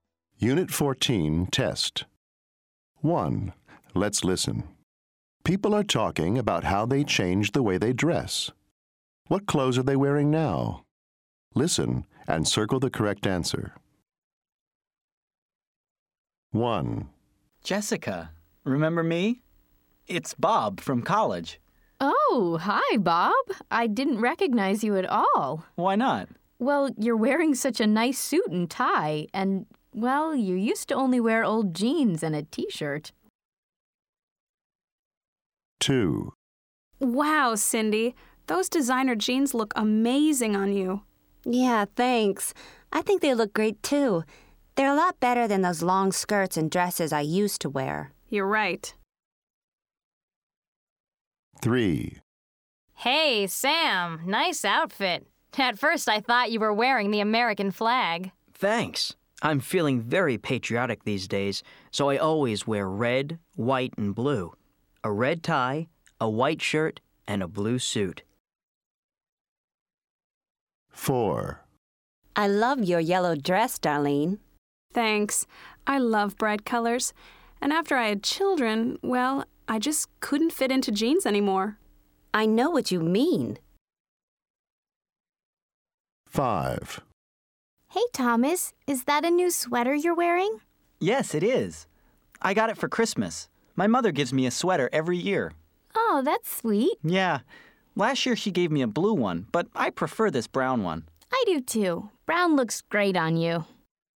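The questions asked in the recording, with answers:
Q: What clothes are they wearing now?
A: a suit and tie

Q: What clothes are they wearing now?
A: designer jeans

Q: What clothes are they wearing now?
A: a red tie, a white shirt and a blue suit

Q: What clothes are they wearing now?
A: a yellow dress

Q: What clothes are they wearing now?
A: a brown sweater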